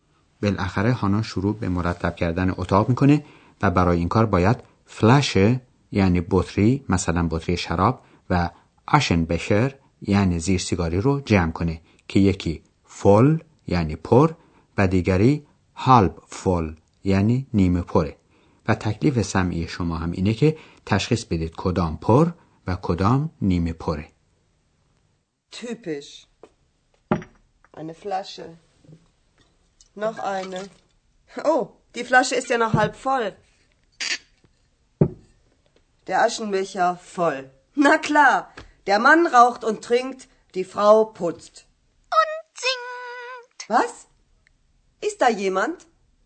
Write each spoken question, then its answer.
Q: تکلیف سمعی شما هم اینه که تشخیص بدید کدام پر و کدام نیمه پره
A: زیر سیگاری پر و بطری شراب نیمه پر بود.